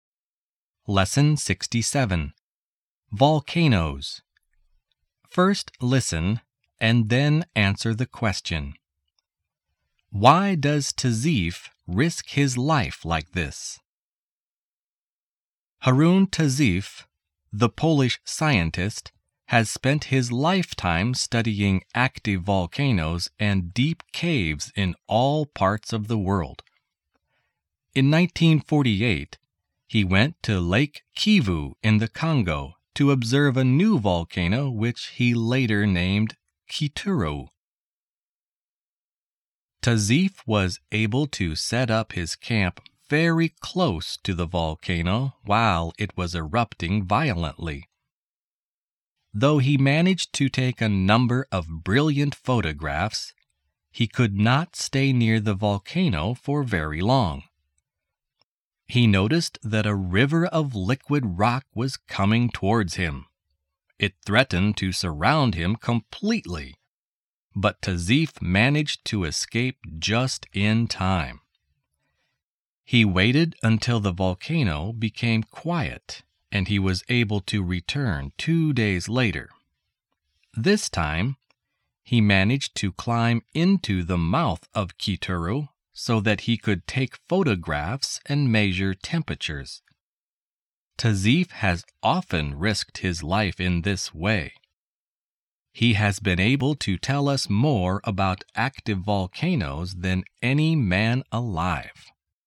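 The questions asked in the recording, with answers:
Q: Why does Tazeef risk his life like this?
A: To study active volcanoes so he can tell us more about them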